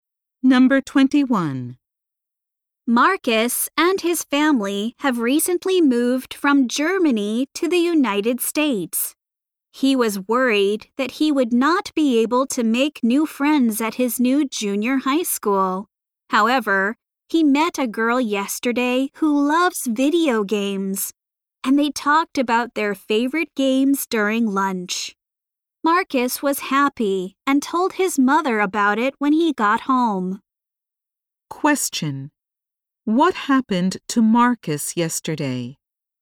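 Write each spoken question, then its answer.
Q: What happened to Marcus yesterday?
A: He met a girl who loves video games and talked with her about favorite games at lunch.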